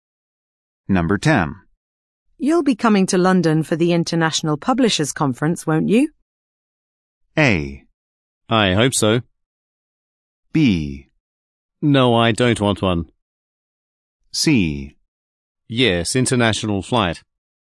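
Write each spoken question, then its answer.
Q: You'll be coming to London for the International Publishers Conference, won't you?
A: A: I hope so.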